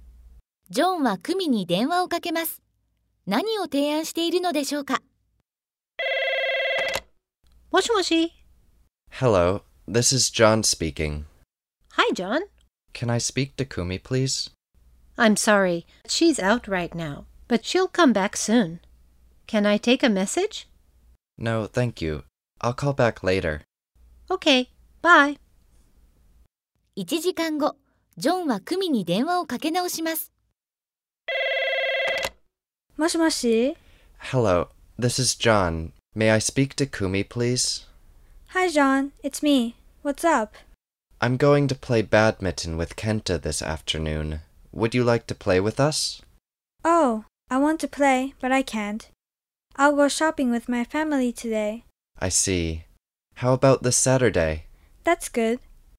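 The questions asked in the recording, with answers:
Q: 何を提案しているのでしょうか?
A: 一緒にバドミントンをすること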